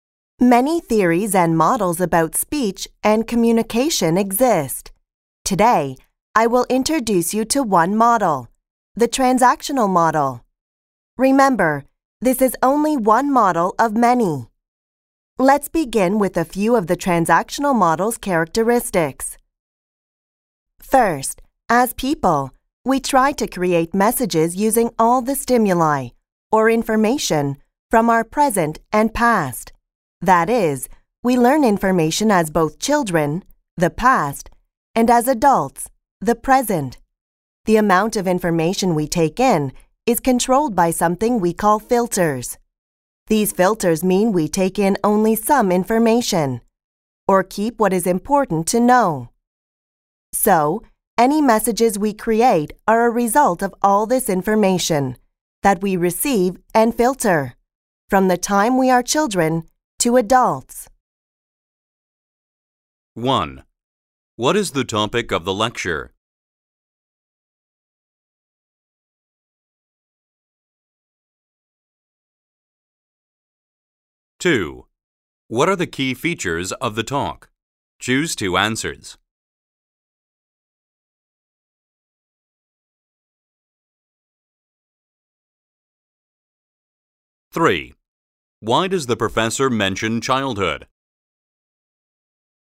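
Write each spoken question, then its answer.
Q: What is the topic of the lecture?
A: The transactional model of communication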